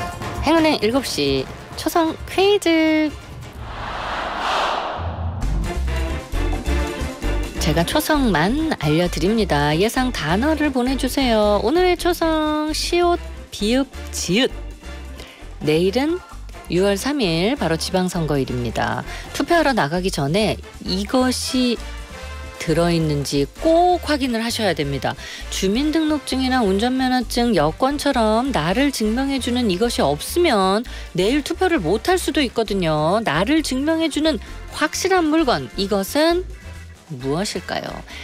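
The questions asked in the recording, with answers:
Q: 나를 증명해주는 확실한 물건, 이것은 무엇일까요?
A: 신분증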